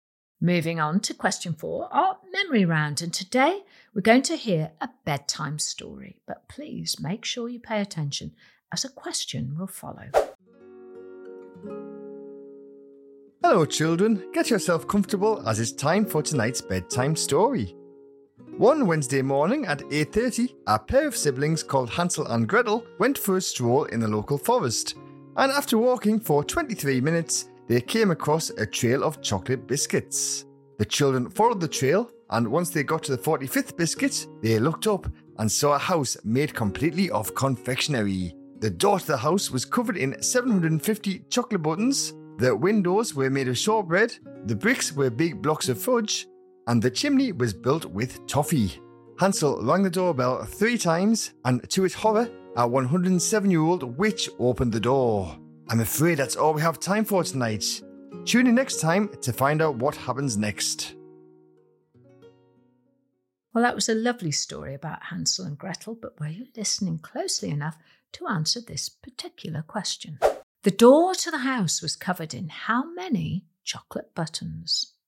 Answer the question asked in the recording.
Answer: The answer is the door was covered in 750 chocolate buttons